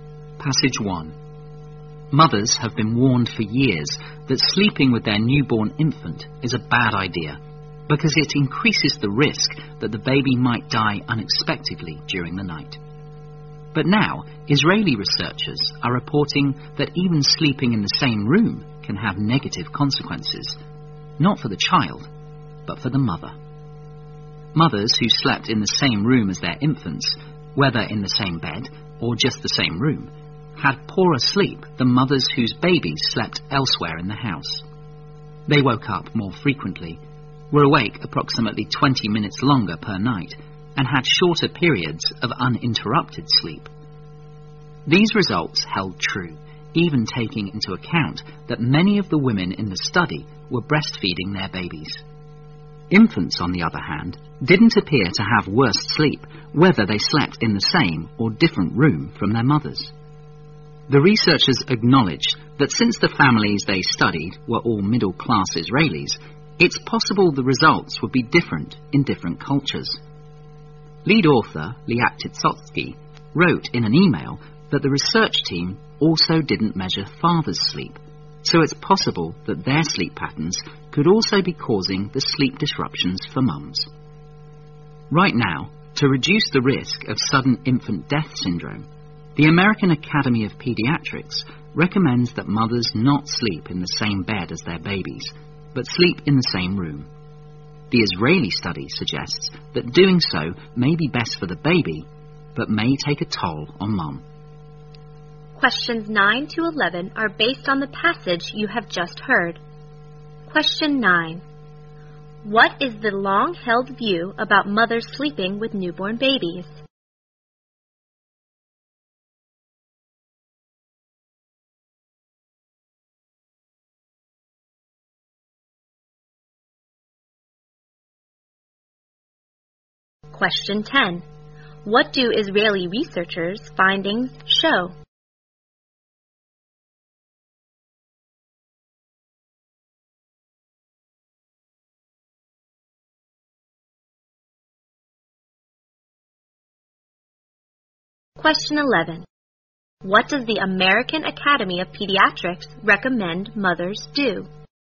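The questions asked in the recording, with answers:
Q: What is the long-held view about mothers sleeping with newborn babies?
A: It increases the risk that the baby might die unexpectedly during the night

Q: What do Israeli researchers' findings show?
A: Mothers sleeping in the same room as their babies sleep worse

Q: What does the American Academy of Pediatrics recommend mothers do?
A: Sleep in the same room as their babies but not in the same bed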